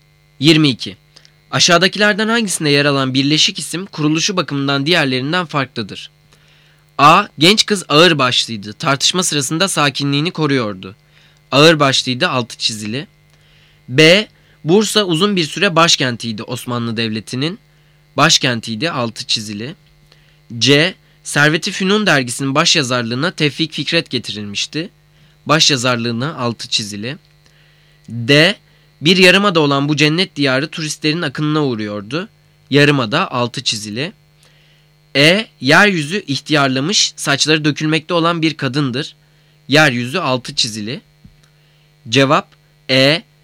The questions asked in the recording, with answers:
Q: Aşağıdakilerden hangisinde yer alan birleşik isim kuruluşu bakımından diğerlerinden farklıdır?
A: Cevap E.